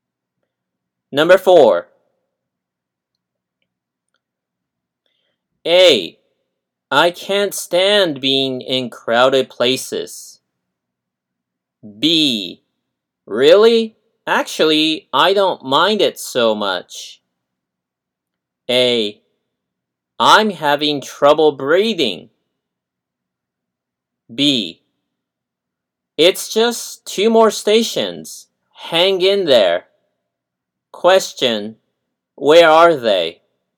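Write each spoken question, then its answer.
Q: Question, where are they?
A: On a crowded train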